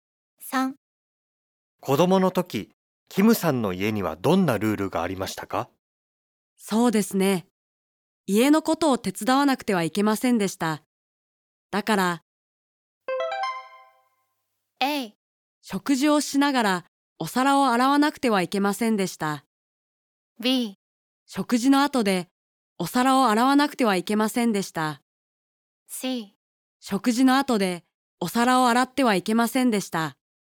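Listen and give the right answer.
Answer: B: 食事の後でお皿を洗わなくてはいけませんでした。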